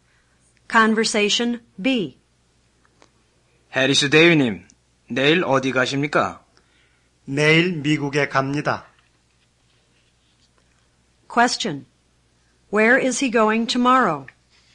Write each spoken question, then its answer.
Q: Where is he going tomorrow?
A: 'He's going to the United States.'